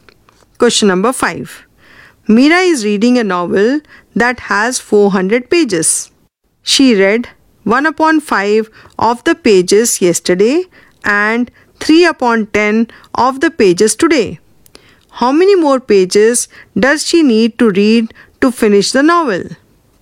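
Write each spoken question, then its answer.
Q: How many more pages does she need to read to finish the novel?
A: 200 pages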